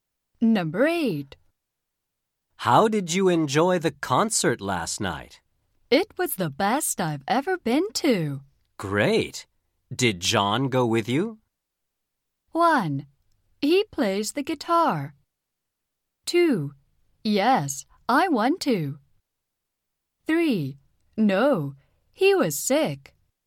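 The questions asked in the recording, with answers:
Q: Great. Did John go with you?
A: 3: No, he was sick.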